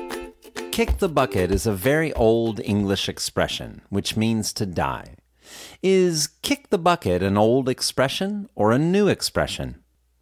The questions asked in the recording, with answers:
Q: Is kick the bucket an old expression or a new expression?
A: Kick the bucket is a very old expression.